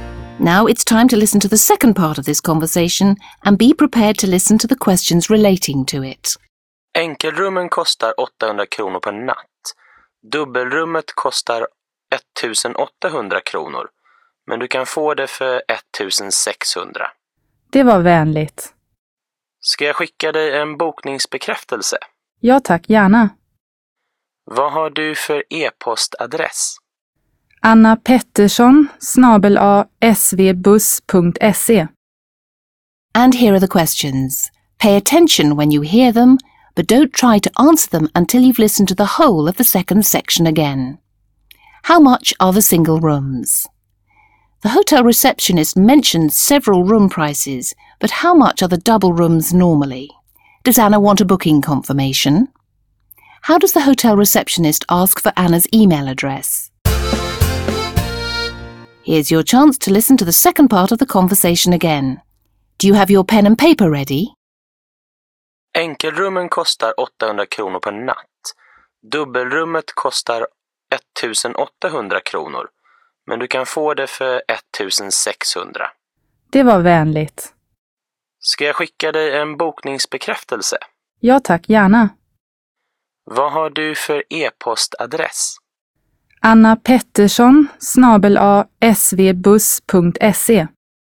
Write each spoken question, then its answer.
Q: How much are the single rooms?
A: The single rooms are 800 kronor.

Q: The hotel receptionist mentioned several room prices, but how much are the double rooms normally?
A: The cost of a double room is normally 1800 kronor.

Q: Does Anna want a booking confirmation?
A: Anna says that she'd be very pleased to receive a booking confirmation.

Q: How does the hotel receptionist ask for Anna's email address?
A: Vad har du för e-postadress?